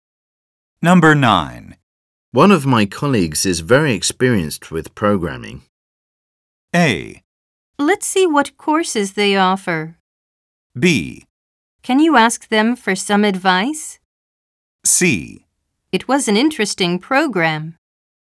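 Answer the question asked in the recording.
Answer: B: Can you ask them for some advice?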